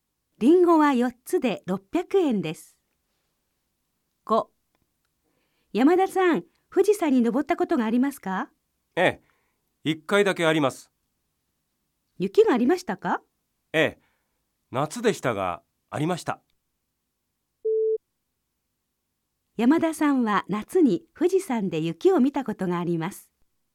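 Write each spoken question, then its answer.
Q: 山田さんは夏に富士山で雪を見たことがあります。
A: 正しい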